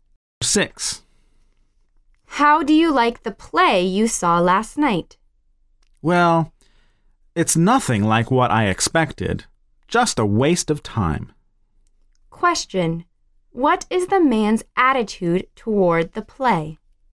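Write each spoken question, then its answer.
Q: What is the man's attitude toward the play?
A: Disappointed; he thinks it was a waste of time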